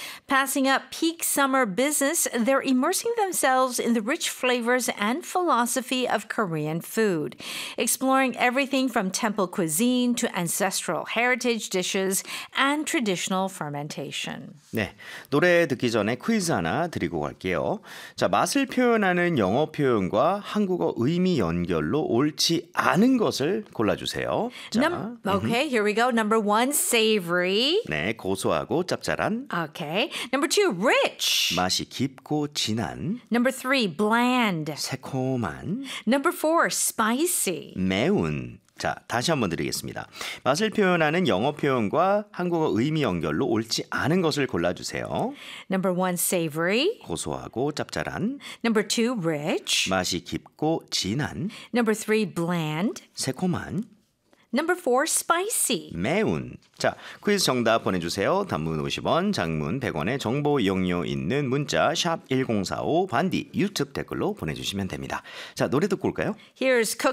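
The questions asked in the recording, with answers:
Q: 맛을 표현하는 영어 표현 과 한국어 의미 연결로 옳지 않은 것을 골라주세요.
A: 3: bland, 새콤한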